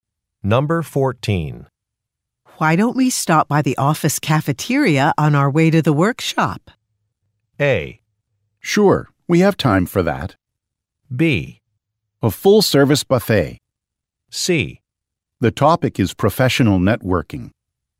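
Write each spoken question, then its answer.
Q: Why don't we stop by the office cafeteria on our way to the workshop?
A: A: Sure, we have time for that.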